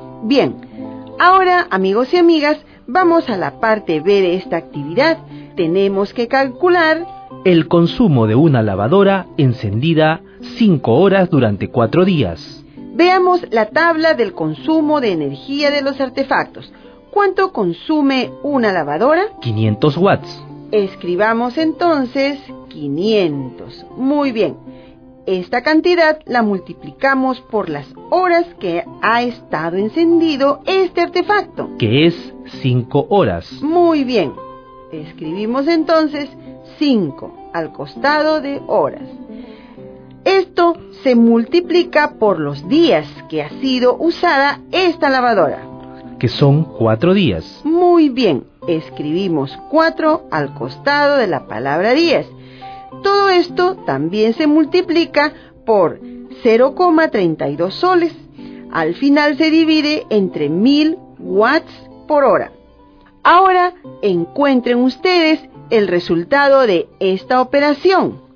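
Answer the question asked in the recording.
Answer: 3 soles con 20 céntimos (500 W × 5 h × 4 días × 0,32 ÷ 1000 = S/ 3,20)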